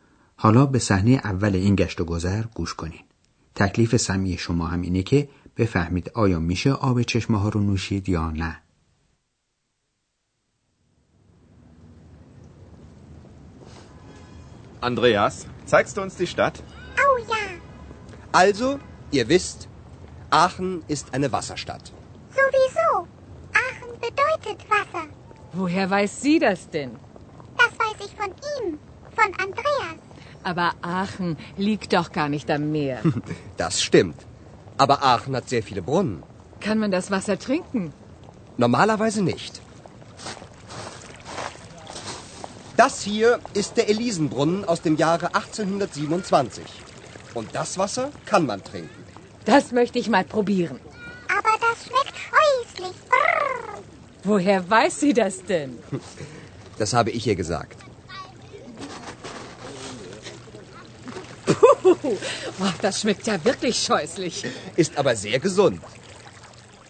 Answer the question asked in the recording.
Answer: پس معلوم شد که آب این چشمه ها رو معمولا نمیشه نوشید ولی آب بعضی از اونها من جمله چشمه الیزن نوشیدنی است